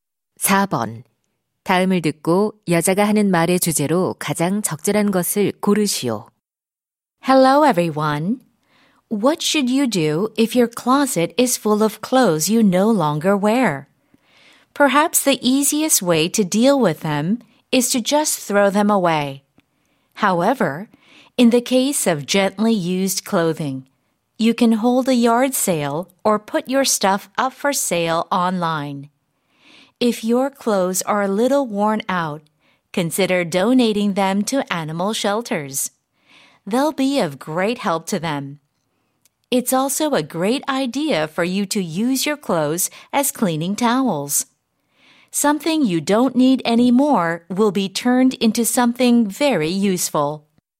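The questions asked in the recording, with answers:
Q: 다음을 듣고 여자가 하는 말의 주제로 가장 적절한 것을 고르시오.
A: 더 이상 입지 않는 옷을 처리하는 방법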